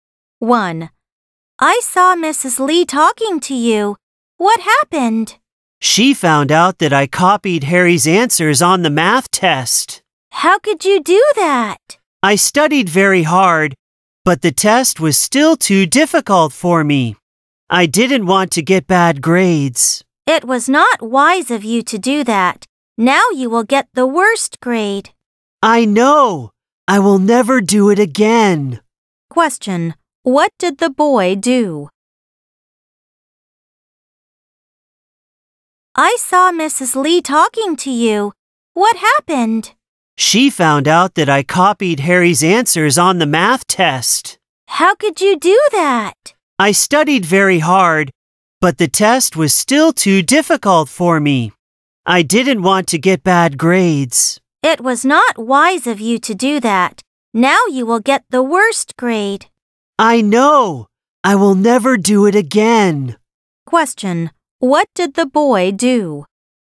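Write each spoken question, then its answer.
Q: What did the boy do?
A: He copied Harry's answers on the math test.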